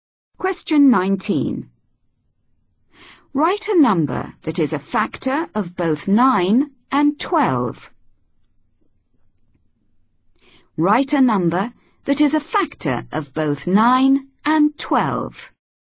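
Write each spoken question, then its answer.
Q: Write a number that is a factor of both 9 and 12.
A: 1 or 3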